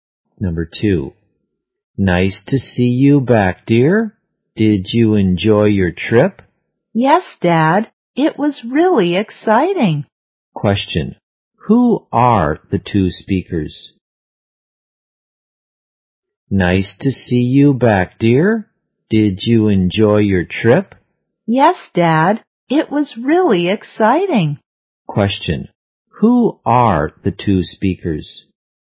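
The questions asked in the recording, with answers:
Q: Who are the two speakers?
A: A father and his child.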